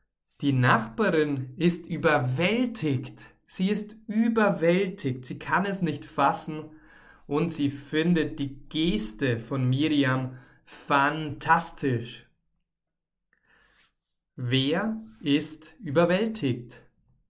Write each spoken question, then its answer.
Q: Wer ist überwältigt?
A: Die Nachbarin. Genau, die Nachbarin ist überwältigt.